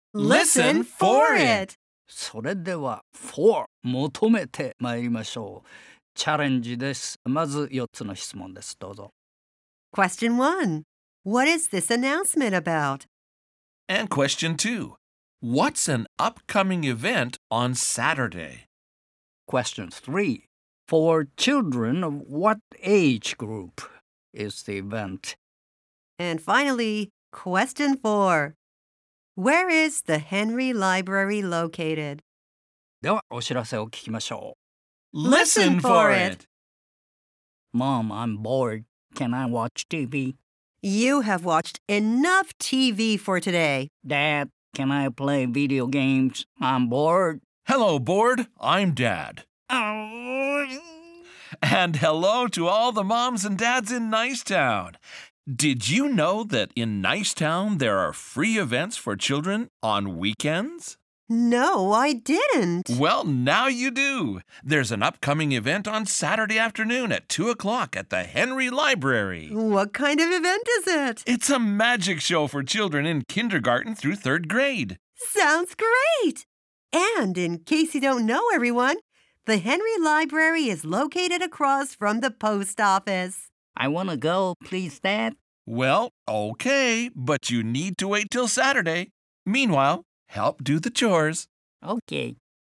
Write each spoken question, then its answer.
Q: What is this announcement about?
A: Free events for children on weekends in Nicetown.

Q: What's an upcoming event on Saturday?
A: It's a magic show.

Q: For children of what age group is the event?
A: Children in kindergarten through third grade.

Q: Where is the Henry Library located?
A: across from the post office.